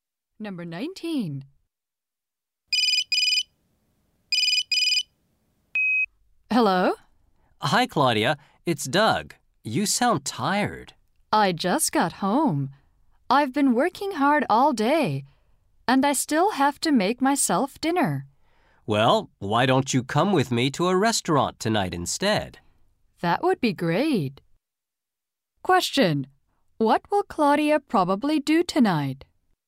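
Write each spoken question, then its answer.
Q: What will Claudia probably do tonight?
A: Go to a restaurant with Doug.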